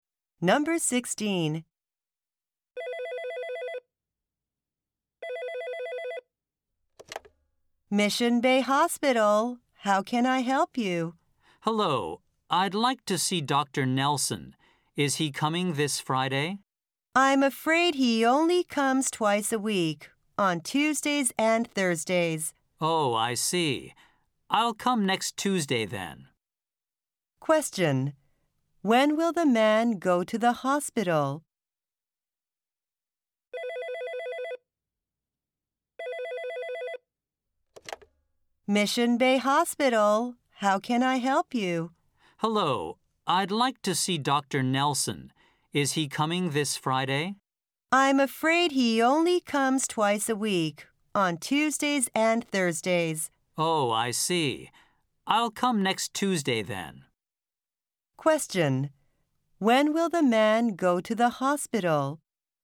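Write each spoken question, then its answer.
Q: When will the man go to the hospital?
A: Next Tuesday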